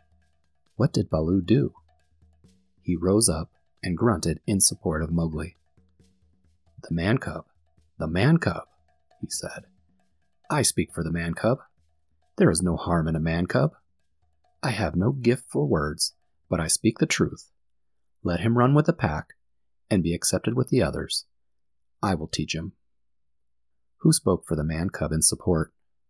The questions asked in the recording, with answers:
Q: Who spoke for the man cub in support?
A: Baloo, the sleepy brown bear, spoke up in support for Mowgli.